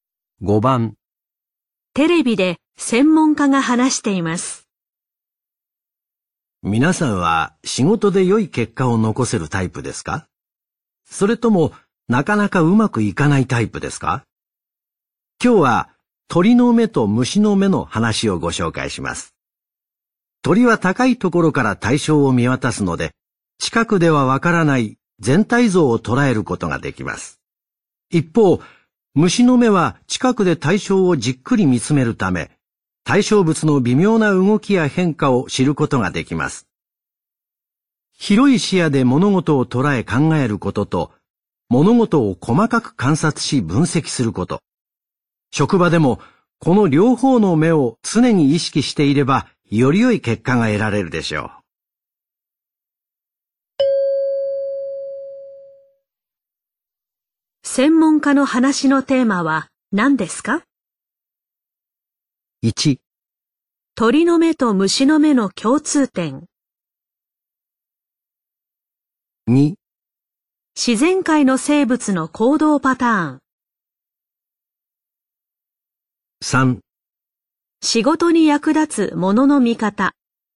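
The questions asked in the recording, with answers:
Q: 専門家の話のテーマは何ですか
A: 3: 仕事に役立つものの見方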